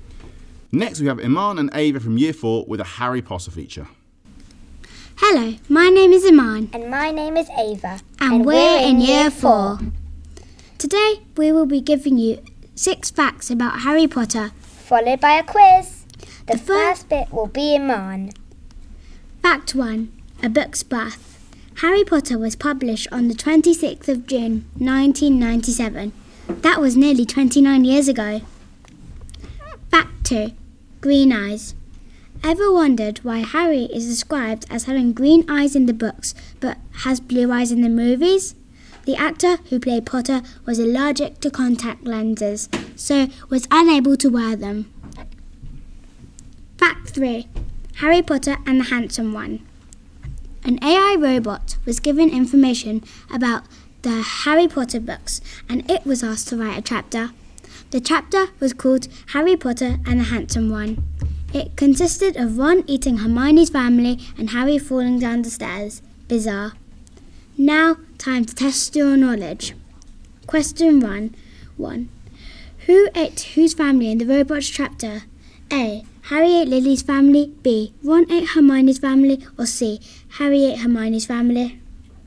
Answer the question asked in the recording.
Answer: The answer is B.